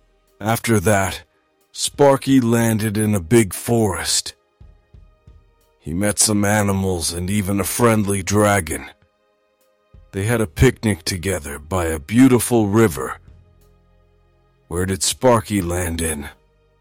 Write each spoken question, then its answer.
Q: Where did Sparky land in?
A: A big forest. He landed in a big forest.